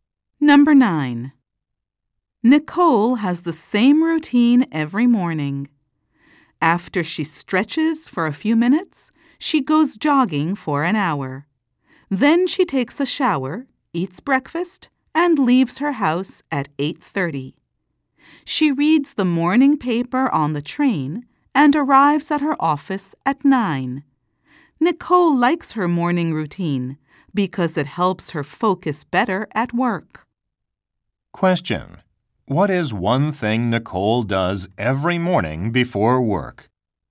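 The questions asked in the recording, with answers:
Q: What is one thing Nicole does every morning before work?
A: Goes jogging for an hour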